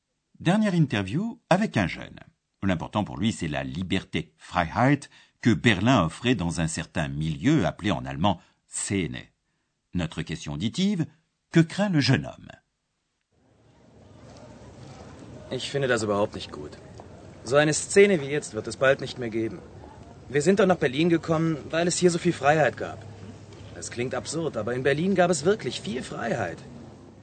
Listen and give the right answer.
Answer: le jeune homme craint que bientôt il n'y ait plus un milieu comme actuellement.